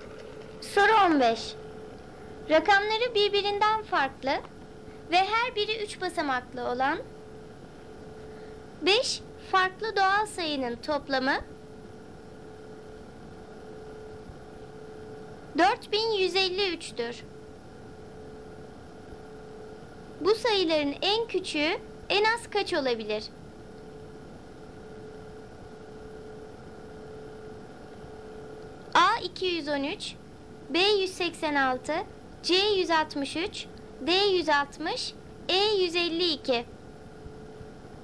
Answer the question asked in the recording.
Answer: Doğru cevap A 213.